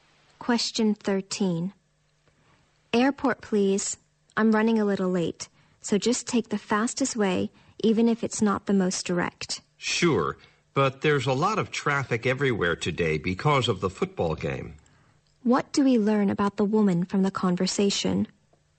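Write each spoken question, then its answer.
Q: What do we learn about the woman from the conversation?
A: She is running late and in a hurry to get to the airport.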